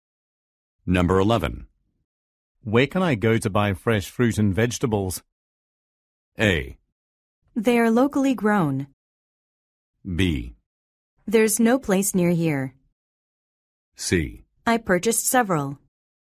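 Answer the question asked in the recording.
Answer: B: There's no place near here.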